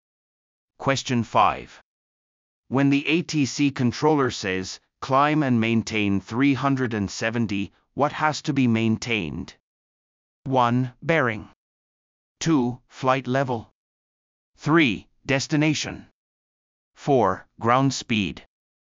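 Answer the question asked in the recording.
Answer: 2: Flight level.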